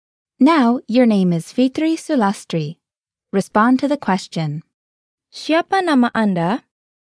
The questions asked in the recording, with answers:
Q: Siapa nama Anda?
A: Nama saya adalah Fitri Sulastri.